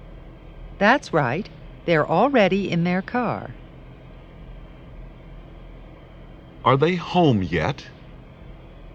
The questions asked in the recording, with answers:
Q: Are they home yet?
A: No, they're not.